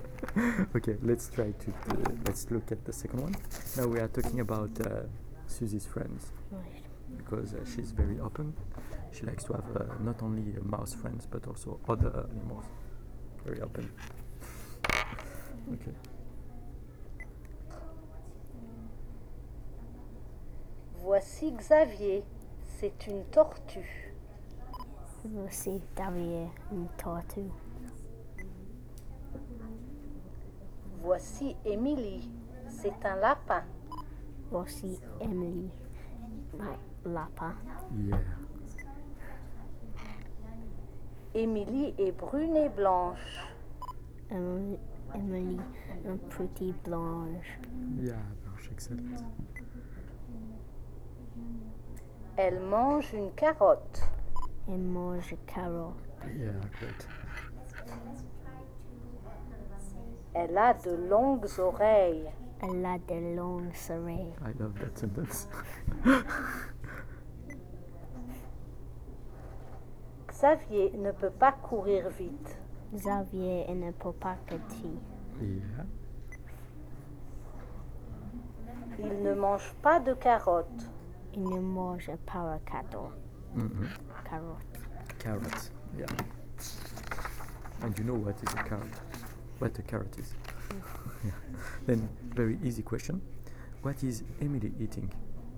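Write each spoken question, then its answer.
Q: What is Emily eating?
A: A carrot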